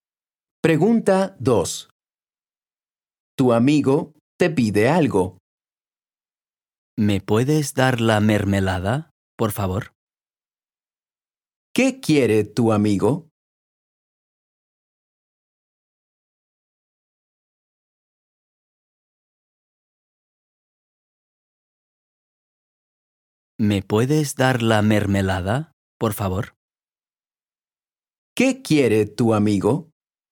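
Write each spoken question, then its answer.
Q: ¿Qué quiere tu amigo?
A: la mermelada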